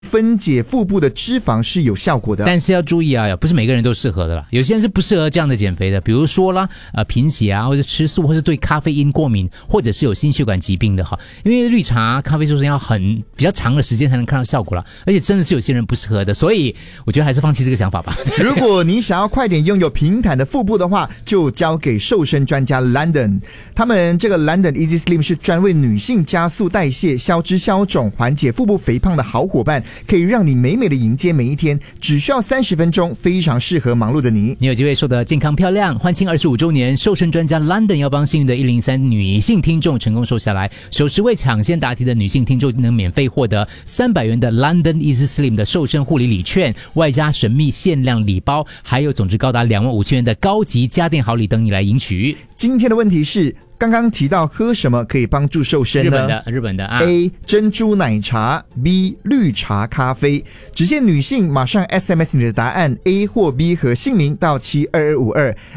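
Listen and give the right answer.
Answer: B: 绿茶咖啡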